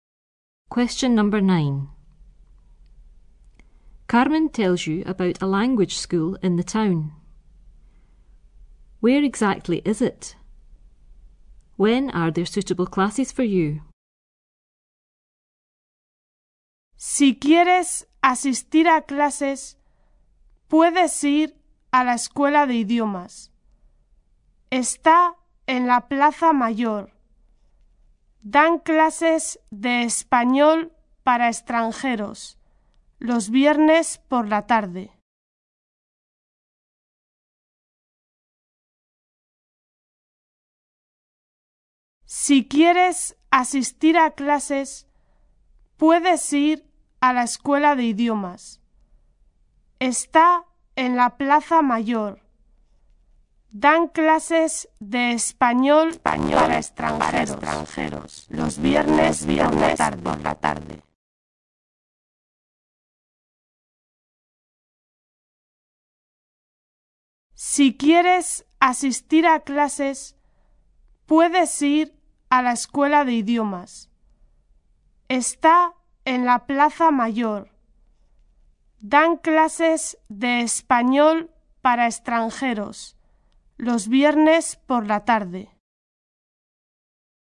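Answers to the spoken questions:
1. In the Plaza Mayor (main square)
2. Friday afternoons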